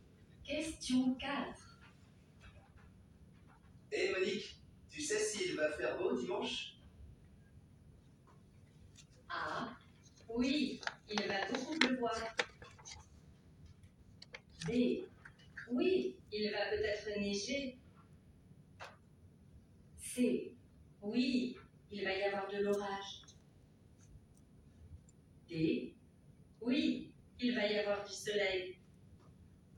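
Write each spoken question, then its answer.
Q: Hey Monique, tu sais s'il va faire beau dimanche?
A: D: oui, il va y avoir du soleil.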